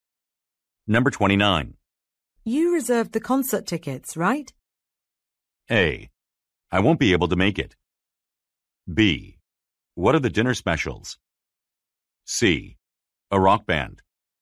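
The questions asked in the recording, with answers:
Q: You reserved the concert tickets, right?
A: A: I won't be able to make it.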